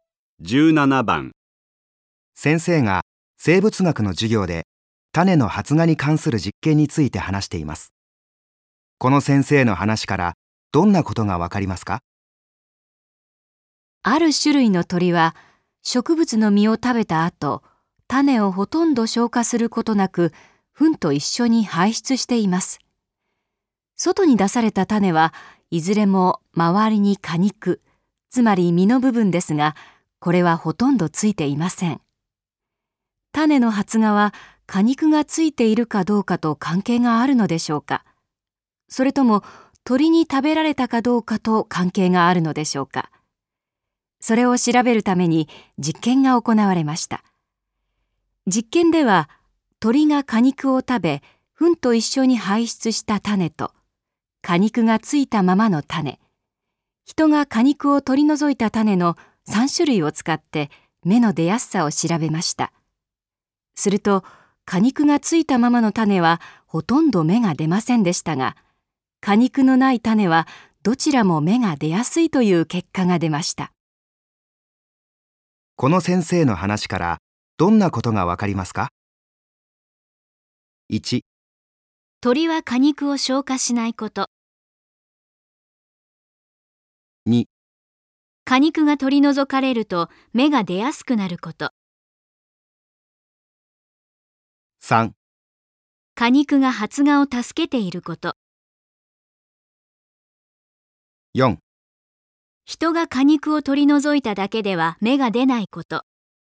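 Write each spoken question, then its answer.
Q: この先生の話からどんなことがわかりますか?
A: 2: 果肉が取り除かれると芽が出やすくなること。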